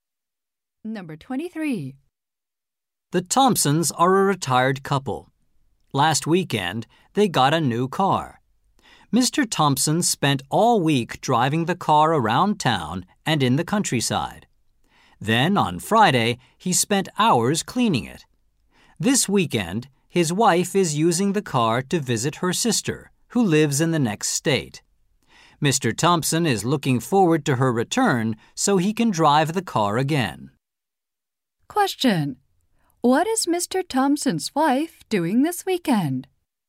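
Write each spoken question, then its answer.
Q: What is Mr. Thompson's wife doing this weekend?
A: Driving the new car to visit her sister in the next state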